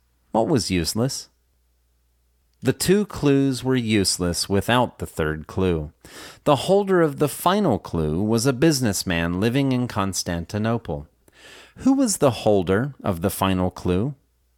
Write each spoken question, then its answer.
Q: Who was the holder of the final clue?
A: A businessman living in Constantinople was the holder of the final clue.